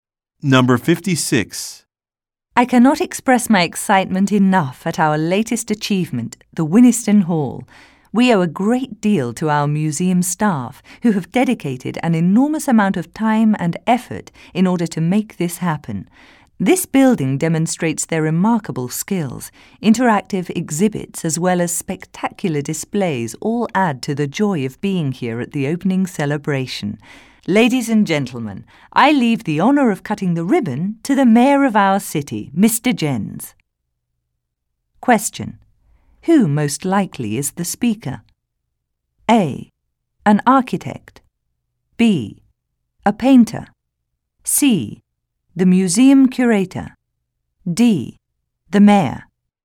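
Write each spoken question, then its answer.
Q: Who most likely is the speaker?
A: C: The museum curator.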